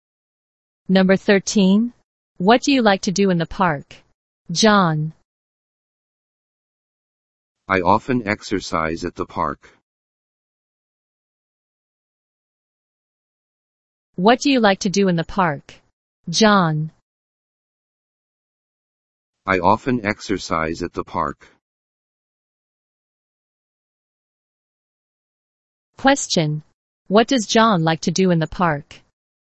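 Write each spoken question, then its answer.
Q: What does John like to do in the park?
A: Exercise.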